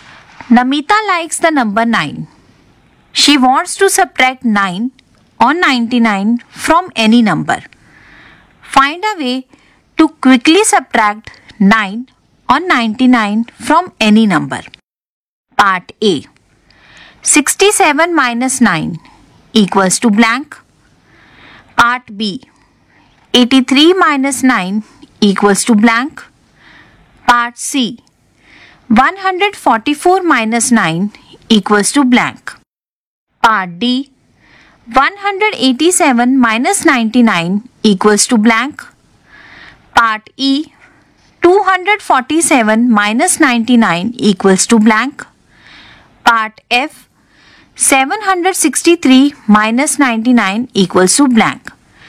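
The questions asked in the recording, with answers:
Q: Part A. 67 minus 9 equals to blank.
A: 58

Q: Part B. 83 minus 9 equals to blank.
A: 74

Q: Part C. 144 minus 9 equals to blank.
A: 135

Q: Part D. 187 minus 99 equals to blank.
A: 88

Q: Part E. 247 minus 99 equals to blank.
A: 148

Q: Part F. 763 minus 99 equals to blank.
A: 664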